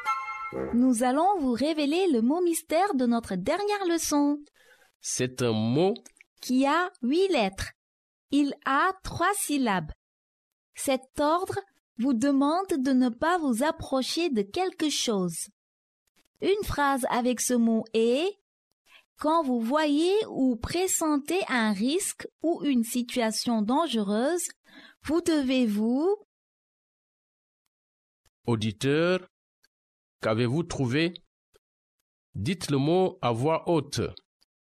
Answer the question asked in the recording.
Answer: Le mot mystère d'aujourd'hui est « éloigné ».